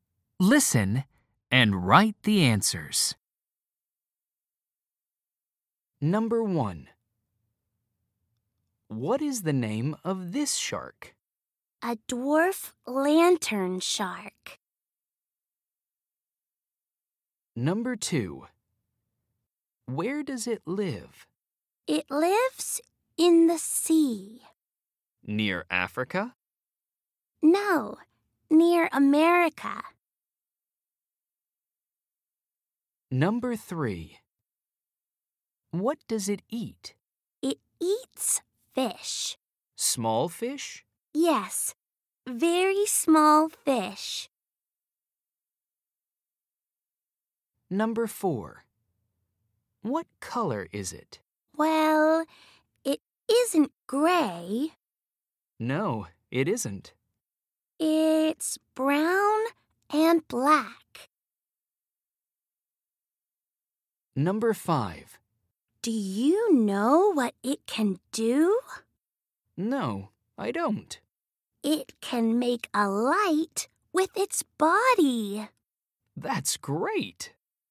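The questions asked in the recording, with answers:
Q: What is the name of this shark?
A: A dwarf lantern shark

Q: Where does it live?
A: In the sea near America

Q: What does it eat?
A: Very small fish

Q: What color is it?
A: Brown and black

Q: Do you know what it can do?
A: It can make a light with its body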